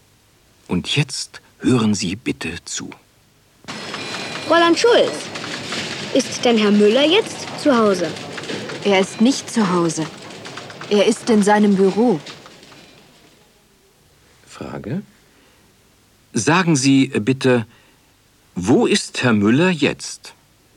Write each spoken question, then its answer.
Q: Sagen Sie bitte, wo ist Herr Müller jetzt?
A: Er ist jetzt in seinem Büro.